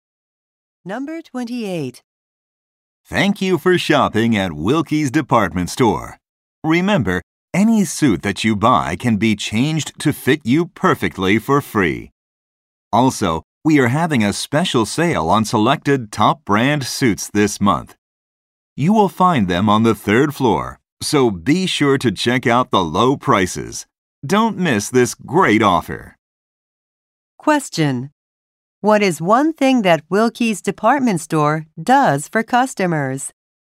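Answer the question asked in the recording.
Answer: Changes suits to fit them for free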